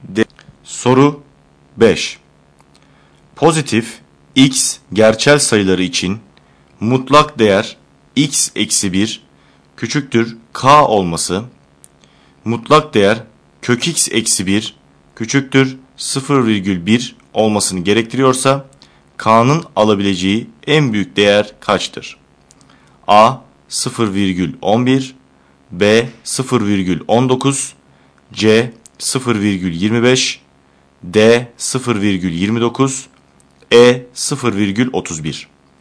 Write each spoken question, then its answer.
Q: Pozitif x gerçel sayıları için mutlak değer x eksi 1 küçüktür k olması, mutlak değer kök x eksi 1 küçüktür 0,1 olmasını gerektiriyorsa, k'nın alabileceği en büyük değer kaçtır?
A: Doğru yanıt B şıkkı.